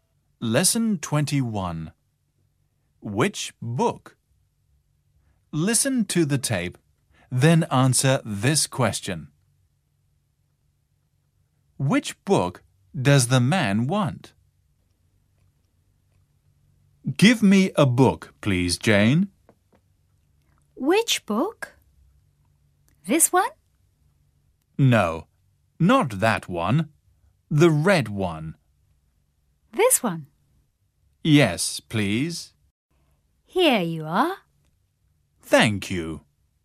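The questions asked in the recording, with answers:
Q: Which book does the man want?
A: The red one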